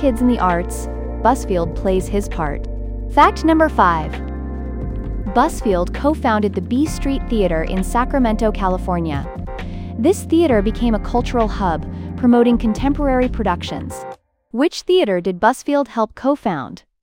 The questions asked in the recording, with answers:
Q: Which theater did Busfield help co-found?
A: Correct answer, B Street Theater.